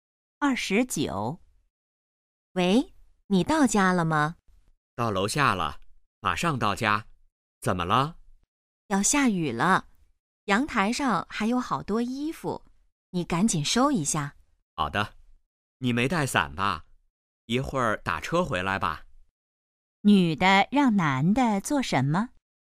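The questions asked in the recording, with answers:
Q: 女的让男的做什么?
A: 收阳台上的衣服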